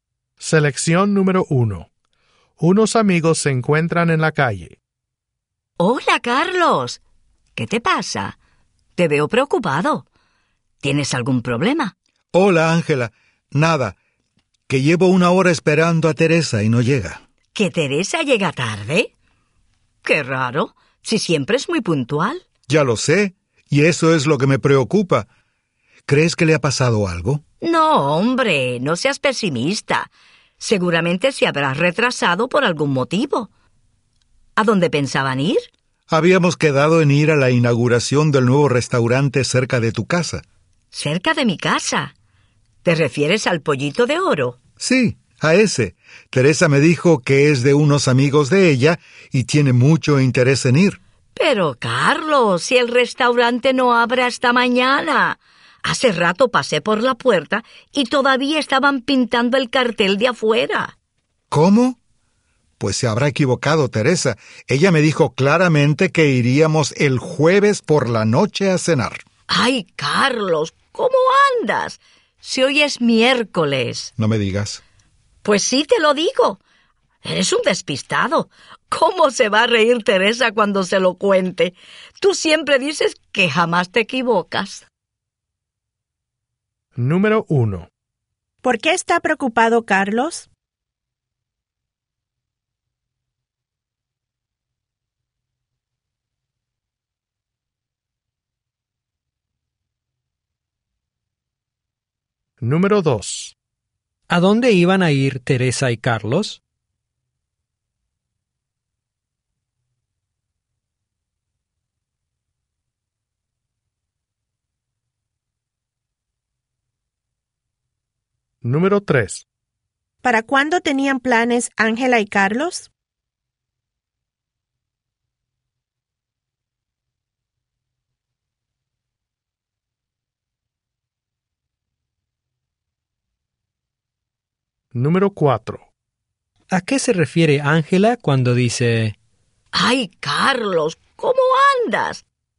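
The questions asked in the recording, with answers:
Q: ¿Por qué está preocupado, Carlos?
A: Lleva una hora esperando a Teresa, que siempre es puntual, y no llega

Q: ¿A dónde iban a ir Teresa y Carlos?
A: A la inauguración de un nuevo restaurante, el Pollito de Oro

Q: ¿A qué se refiere Ángela cuando dice...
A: A que Carlos está despistado y se ha equivocado de día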